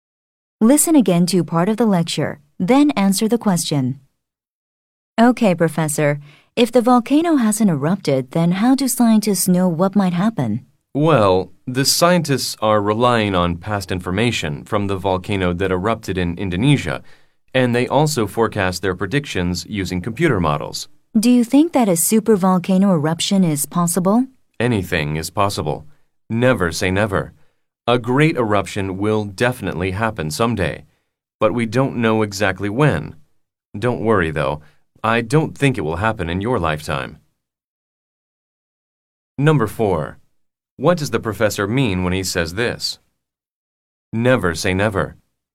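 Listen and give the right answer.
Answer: A supervolcano eruption is possible; it will happen someday, though no one knows when.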